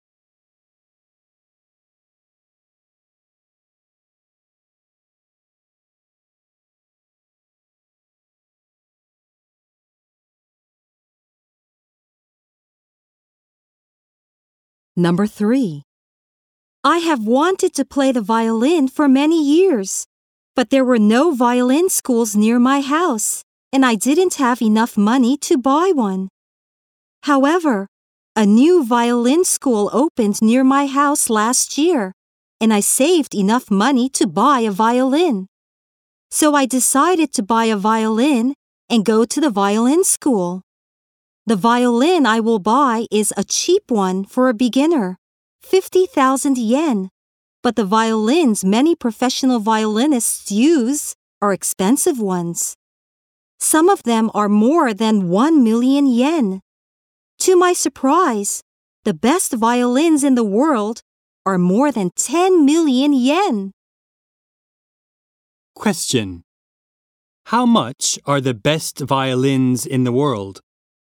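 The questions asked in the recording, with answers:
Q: How much are the best violins in the world?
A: More than 10 million yen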